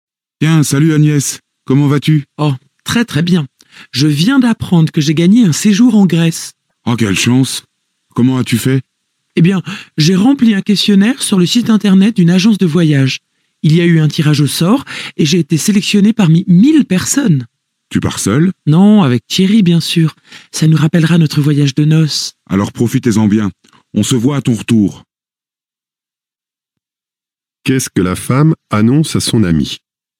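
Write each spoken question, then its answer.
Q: Qu'est-ce que la femme annonce à son ami?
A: Elle a gagné un séjour en Grèce (à un tirage au sort).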